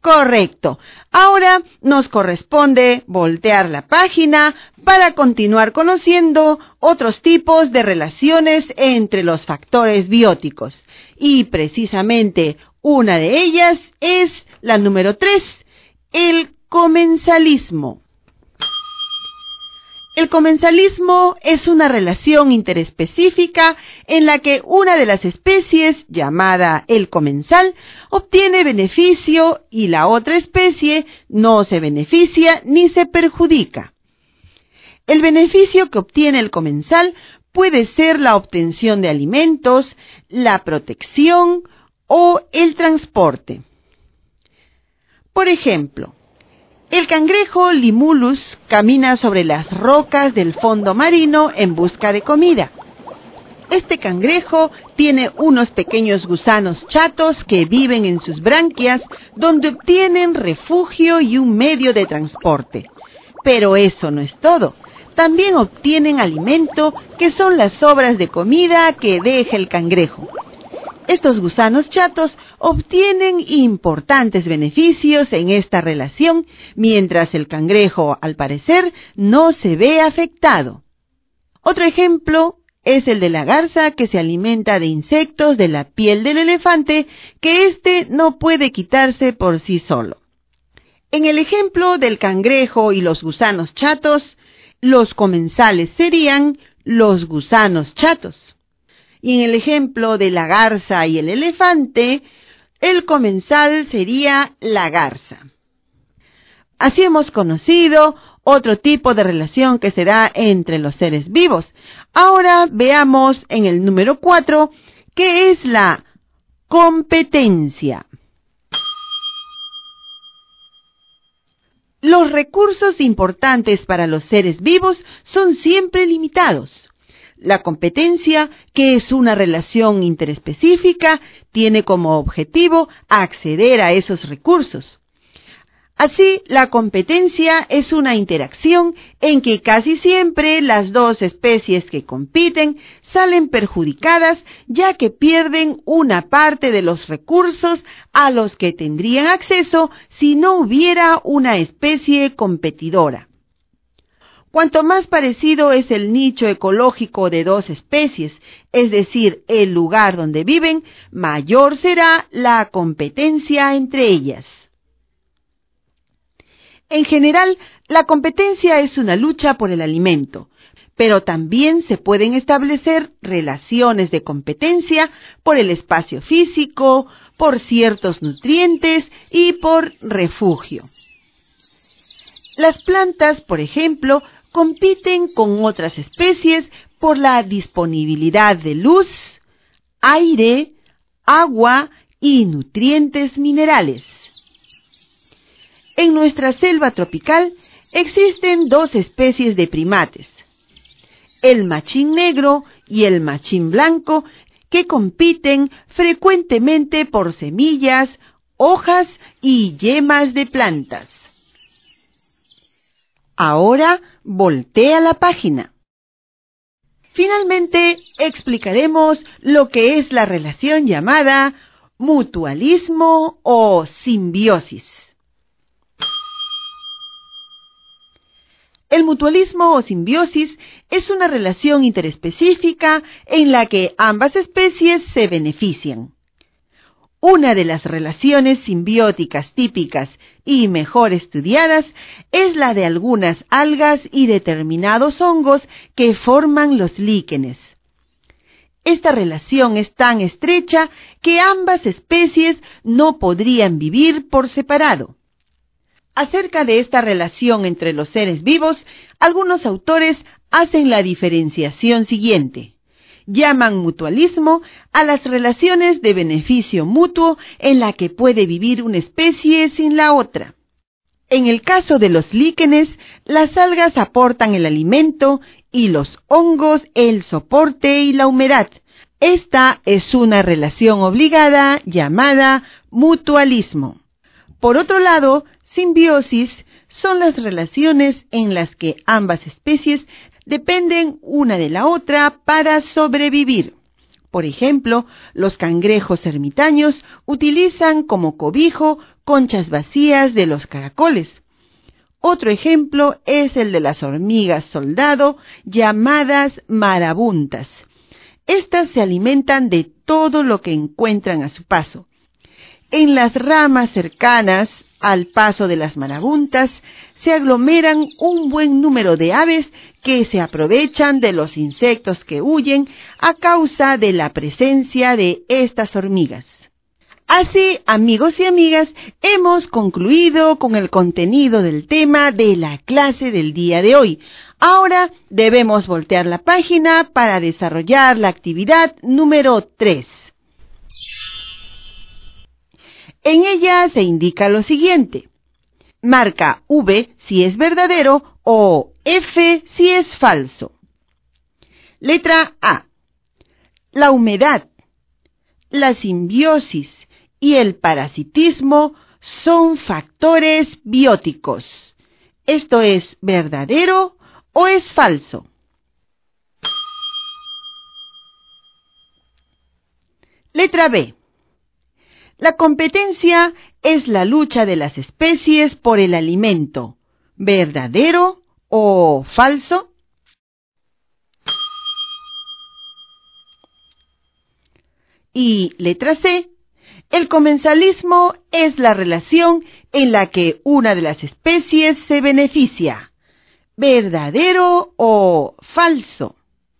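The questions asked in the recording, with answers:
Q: Letra A. La humedad, la simbiosis y el parasitismo son factores bióticos. ¿Esto es verdadero o es falso?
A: Falso

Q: Y letra C. El comensalismo es la relación en la que una de las especies se beneficia. ¿Verdadero o falso?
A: Verdadero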